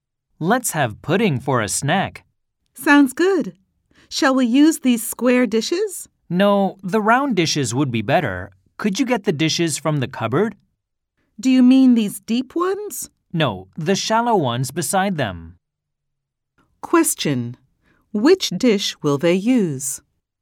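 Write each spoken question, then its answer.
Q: which dish will they use?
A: the round, shallow dish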